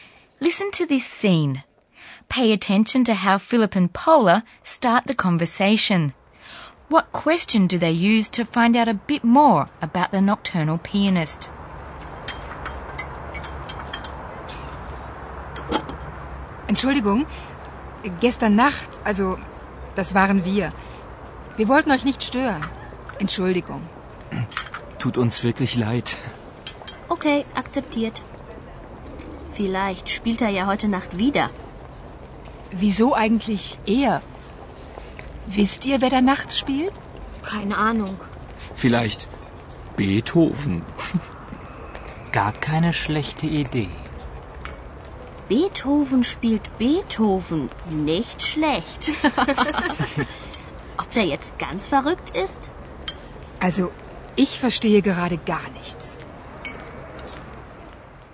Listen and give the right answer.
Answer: And this remark prompts Paula to ask whether the students know who is playing at night.